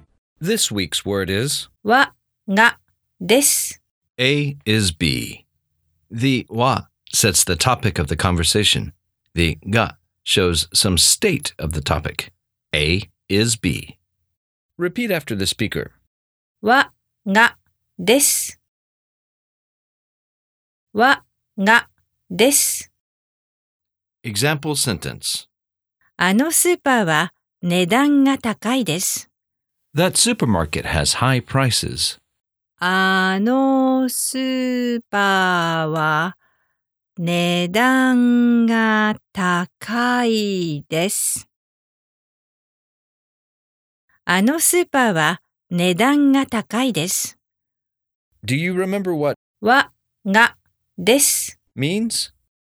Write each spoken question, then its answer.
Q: Do you remember what わがです means?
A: A is B.